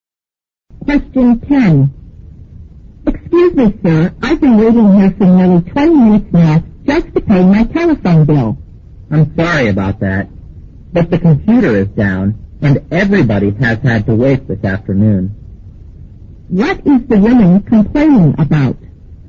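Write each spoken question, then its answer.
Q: What is the woman complaining about?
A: Waiting nearly 20 minutes to pay her telephone bill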